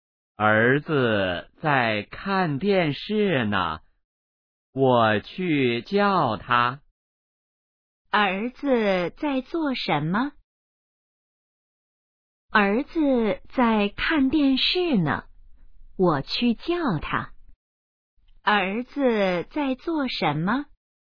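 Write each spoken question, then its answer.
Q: 儿子在做什么?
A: 看电视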